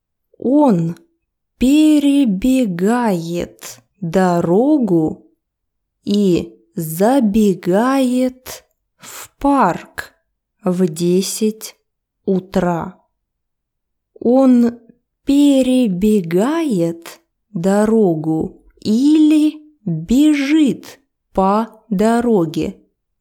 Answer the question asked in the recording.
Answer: Он перебегает дорогу с одной стороны на другую сторону дороги.